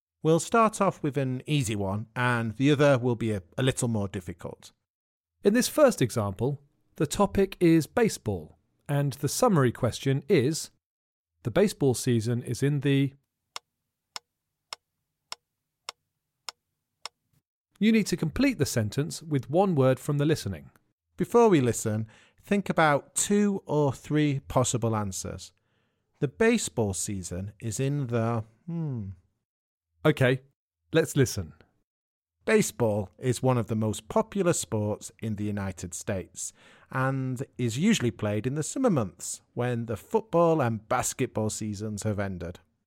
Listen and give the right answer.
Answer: The answer is summer.